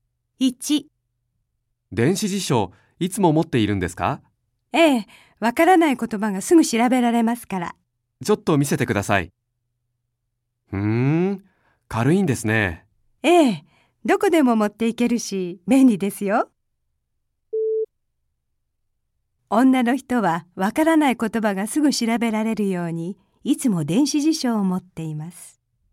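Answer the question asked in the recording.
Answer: ○(正しい)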